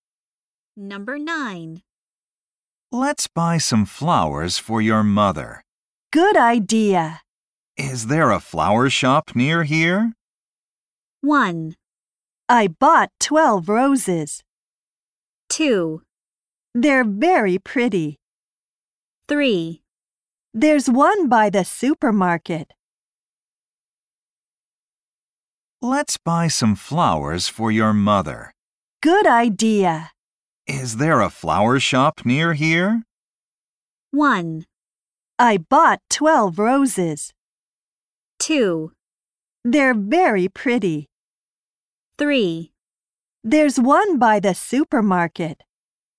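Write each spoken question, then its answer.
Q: Is there a flower shop near here?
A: 3: There's one by the supermarket.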